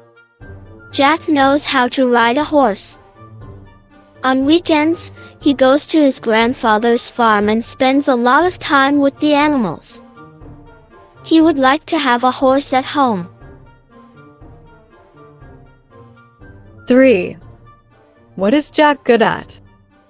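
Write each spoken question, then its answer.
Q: What is Jack good at?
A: Riding a horse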